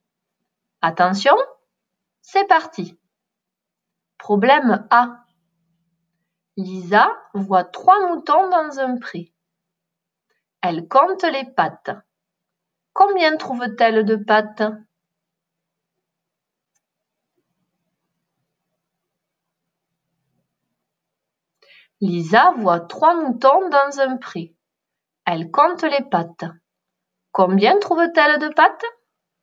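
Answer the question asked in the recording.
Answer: 12 pattes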